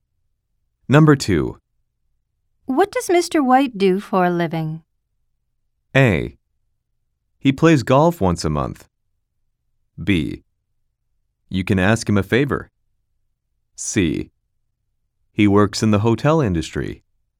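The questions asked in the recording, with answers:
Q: What does Mr. White do for a living?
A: C: He works in the hotel industry.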